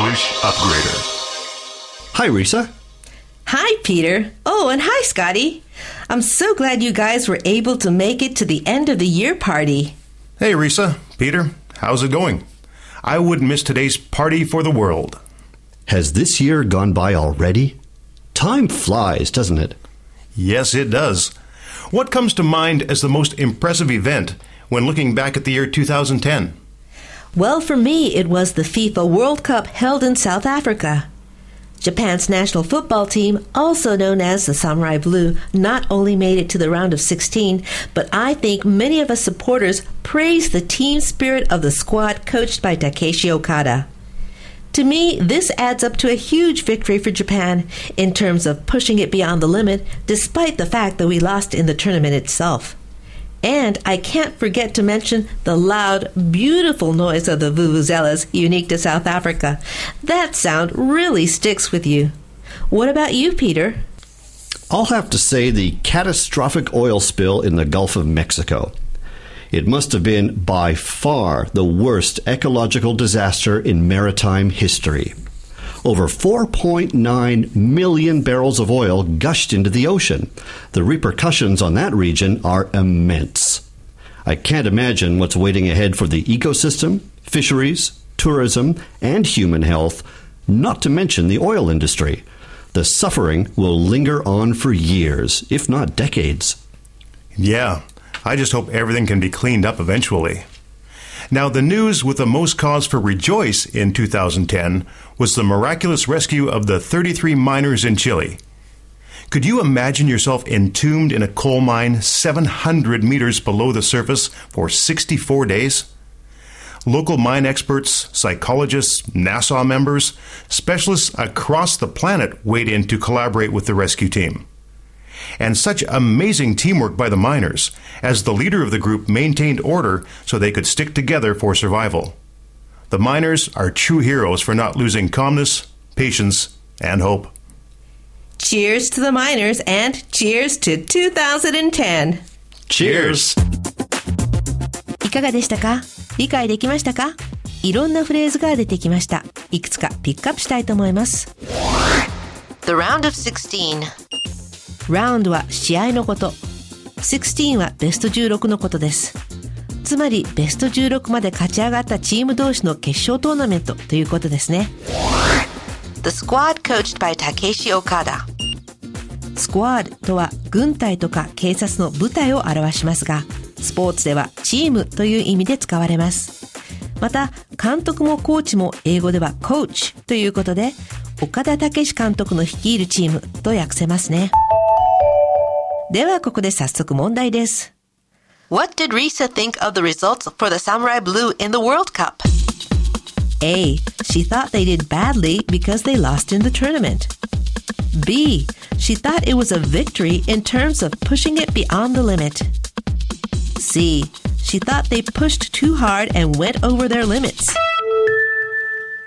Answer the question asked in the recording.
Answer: 正解は B。